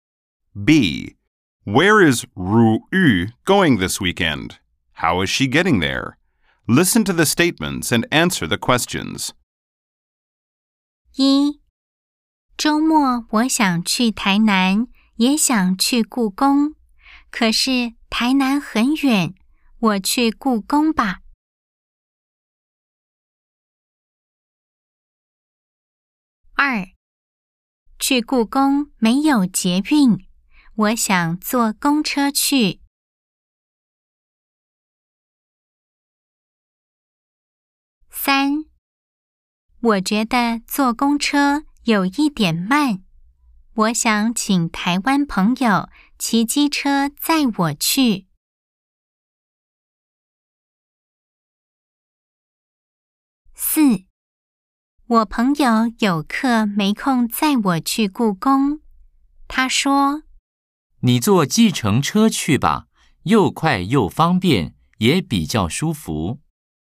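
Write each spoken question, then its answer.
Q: Where is Ru Yu going this weekend?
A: The National Palace Museum (故宫)

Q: How is she getting there?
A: By taxi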